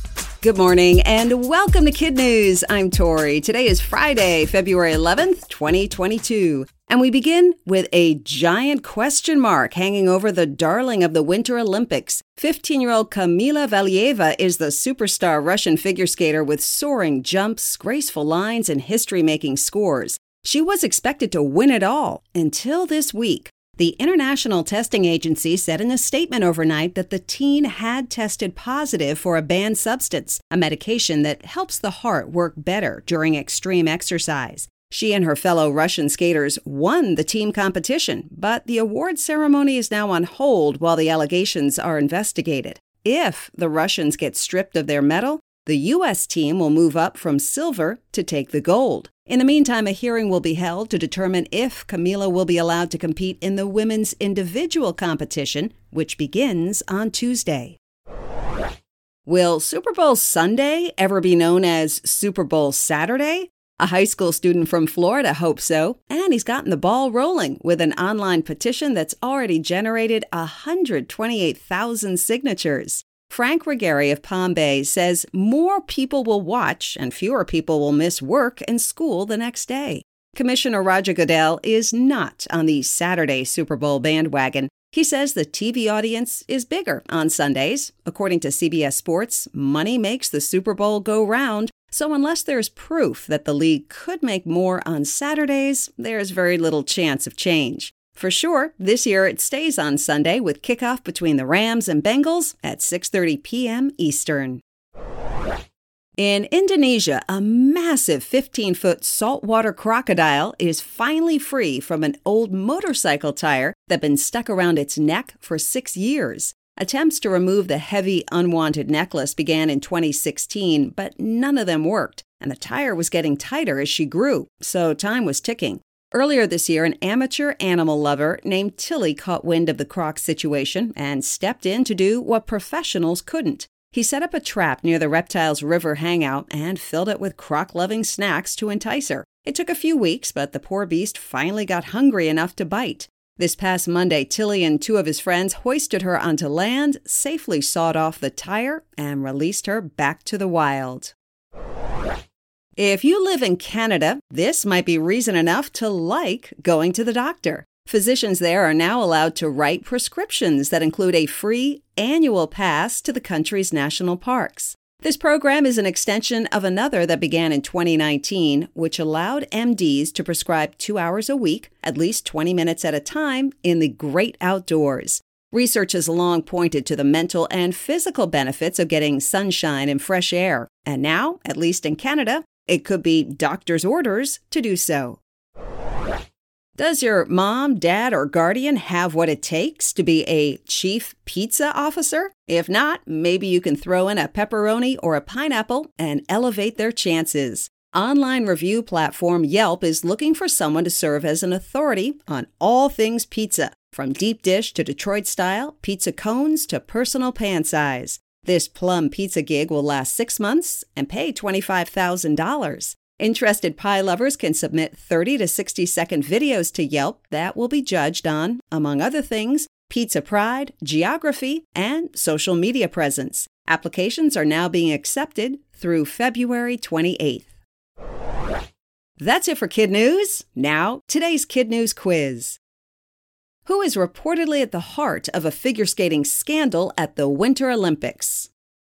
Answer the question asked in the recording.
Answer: Fifteen-year-old Kamila Valieva.